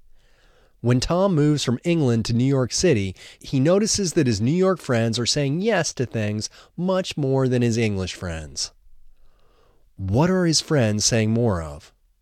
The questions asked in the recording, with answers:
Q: What are his friends saying more of?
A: His friends are saying yes more.